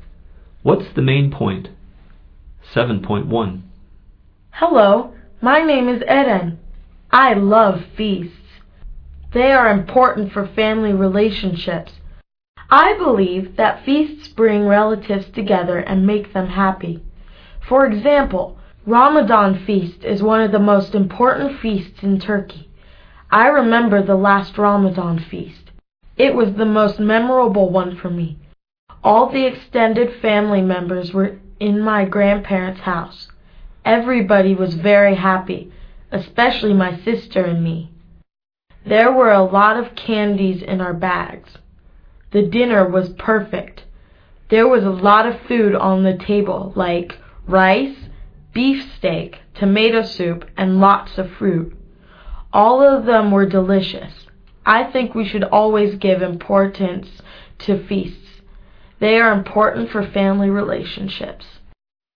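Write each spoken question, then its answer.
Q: What's the main point?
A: Feasts are important for family relationships; they bring relatives together and make them happy.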